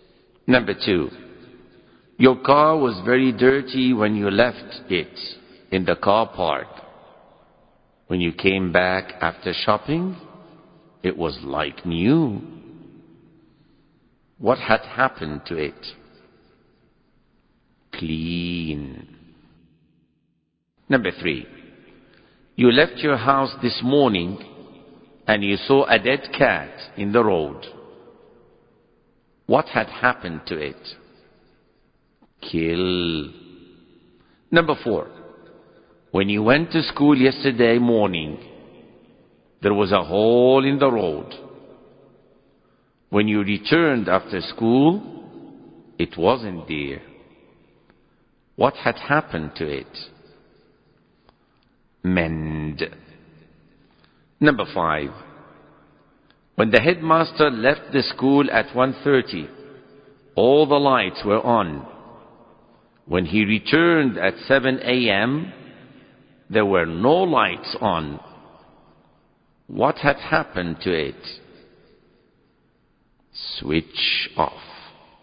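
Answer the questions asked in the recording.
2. It had been cleaned.
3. It had been killed.
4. It had been mended.
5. They had been switched off.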